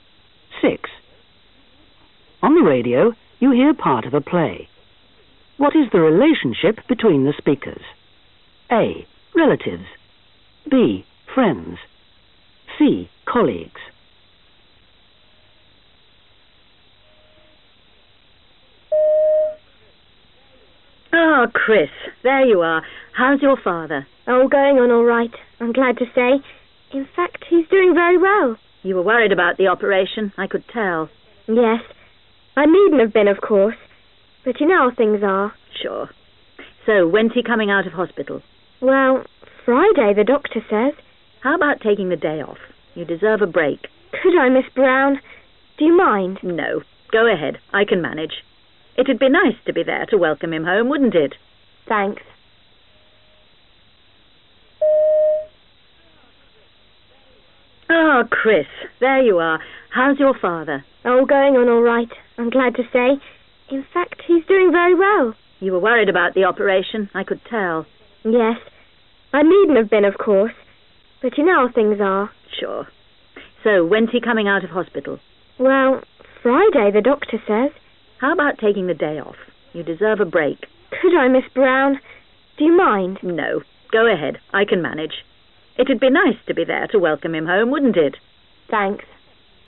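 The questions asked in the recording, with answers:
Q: What is the relationship between the speakers? A. Relatives. B. Friends. C. Colleagues.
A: C: Colleagues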